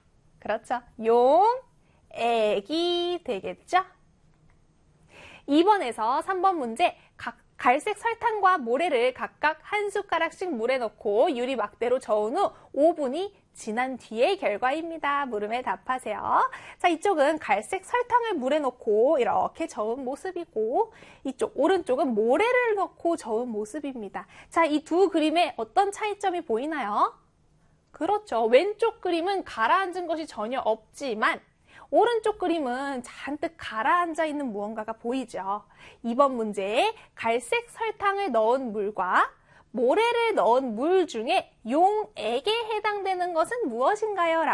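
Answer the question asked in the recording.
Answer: 갈색 설탕을 넣은 물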